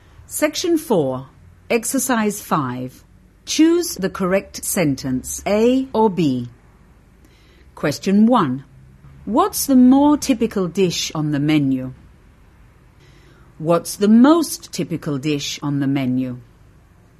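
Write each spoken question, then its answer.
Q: What's the more typical dish on the menu?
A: B: What's the most typical dish on the menu?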